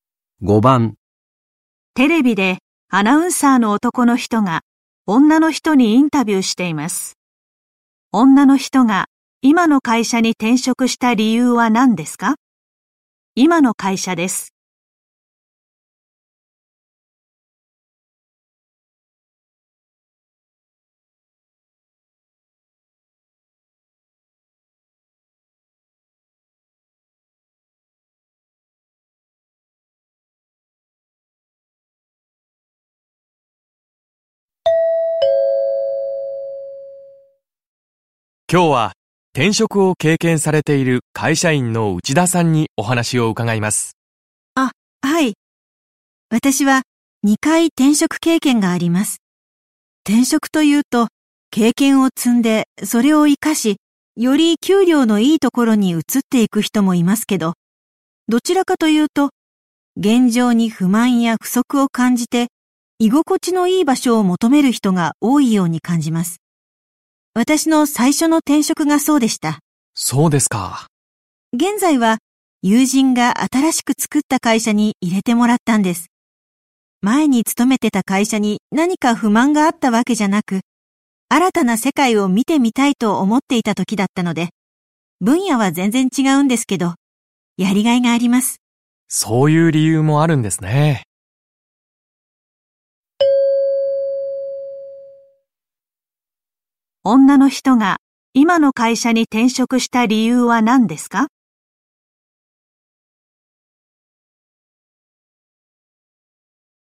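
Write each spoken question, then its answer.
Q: 女の人が今の会社に転職した理由は何ですか?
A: 新たな世界を見てみたいと思っていたから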